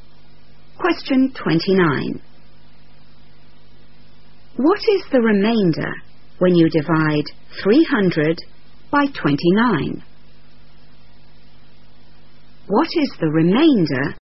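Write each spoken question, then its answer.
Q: What is the remainder when you divide 300 by 29?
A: 10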